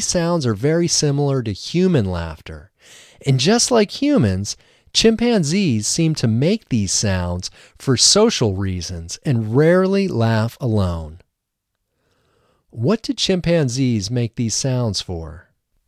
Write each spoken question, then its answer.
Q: What do chimpanzees make these sounds for?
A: Chimpanzees make these sounds for social reasons.